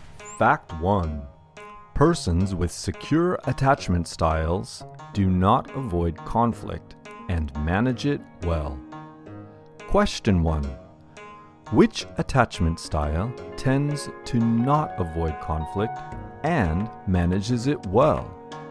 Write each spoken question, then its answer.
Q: Which attachment style tends to not avoid conflict and manages it well?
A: Persons with secure attachment styles do not avoid conflict and manage it well.